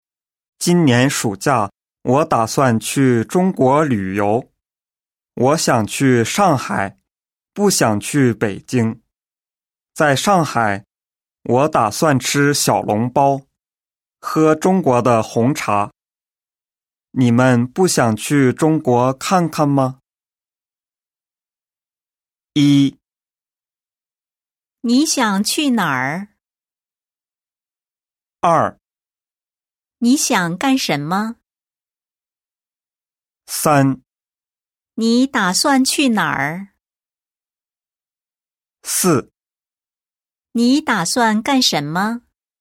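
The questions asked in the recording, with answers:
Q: 你想去哪儿?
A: 上海

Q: 你打算去哪儿?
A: 中国上海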